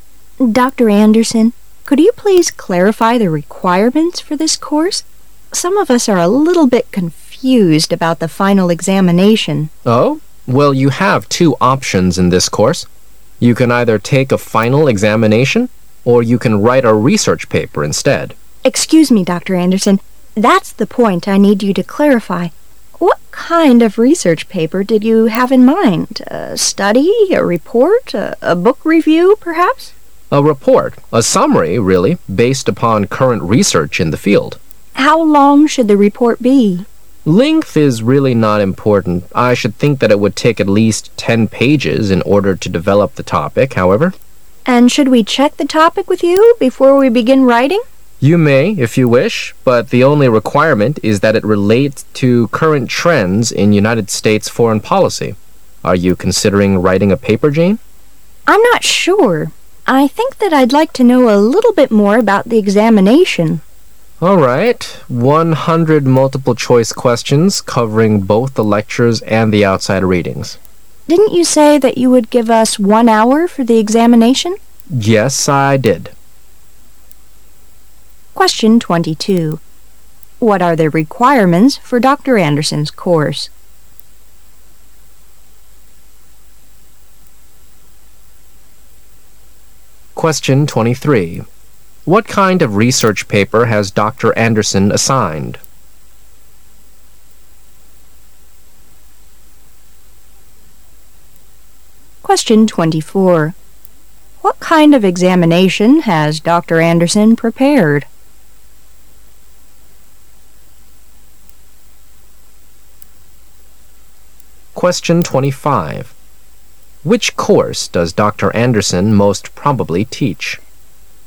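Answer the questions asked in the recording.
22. Either a final examination or a research paper
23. A report summarizing current research in the field
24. 100 multiple-choice questions on lectures and outside readings, 1 hour
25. United States foreign policy

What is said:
[解析] 22-25 W: Dr. Anderson, could you please clarify the requirements for this course? Some of us are a little bit confused about the final examination. M: Oh? Well, you have two options in this course. You can either take a final examination or you can write a research paper instead. W: Excuse me, Dr. Anderson. That's the point I need. you to clarify. What kind of research paper did you have in mind? A study? A report? A book review, perhaps? M: A report. A summary really, based upon current research in the field. W: How long should the report be7 M: Length is really not important. I should think that it would take at least ten pages in order to develop the topic, however. 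W: And should we check the topic with you before we begin writing? M: You may, if you wish. But the only requirement is that it relate to current trends in United States foreign policy. Are you considering writing a paper, Jane? W: I'm not sure. I think that I'd like to know a little bit more about the examination. M: All right. One hundred multiple-choice questions covering both the lectures and the outside readings. W: Didn't you say that you would give us one hour for the examination? M: Yes, I did. What are the requirements for Dr. Anderson's course?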